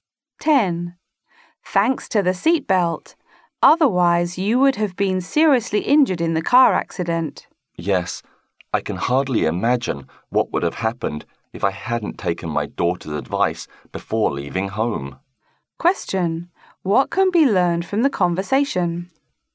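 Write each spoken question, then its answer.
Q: What can be learned from the conversation?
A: Her daughter advised her to wear a seatbelt, which saved her from serious injury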